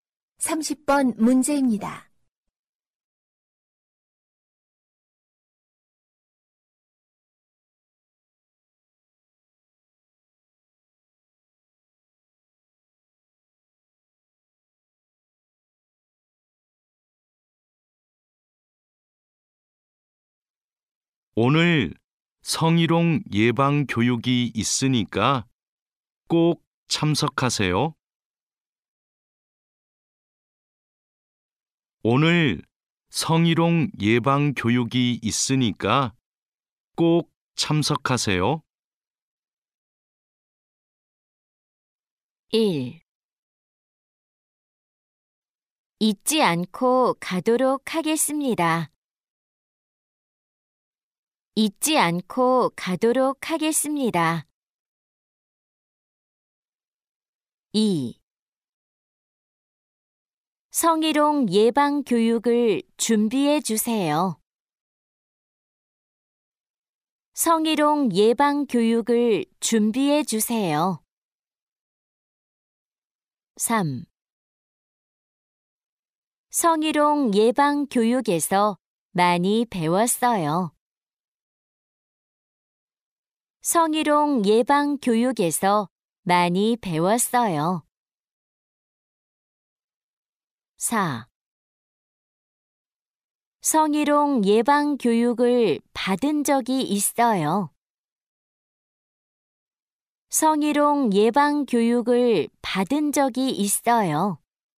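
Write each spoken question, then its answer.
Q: 오늘 성희롱 예방교육이 있으니까 꼭 참석하세요.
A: 1: 잊지 않고 가도록 하겠습니다.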